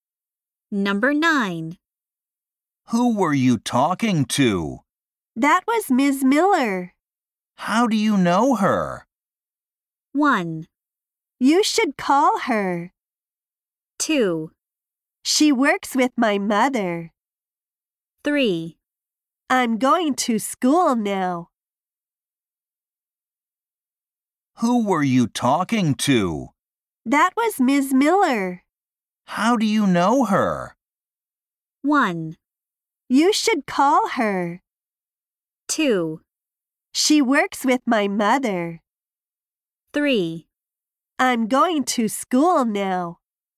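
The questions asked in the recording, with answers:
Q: How do you know her?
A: 2: She works with my mother.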